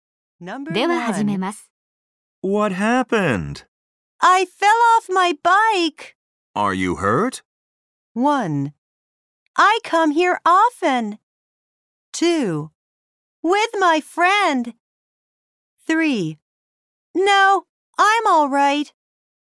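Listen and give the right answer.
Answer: 3: No, I'm all right.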